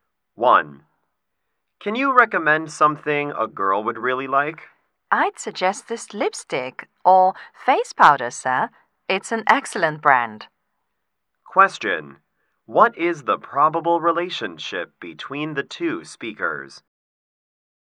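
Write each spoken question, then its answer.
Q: What is the probable relationship between the two speakers?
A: Shop assistant and customer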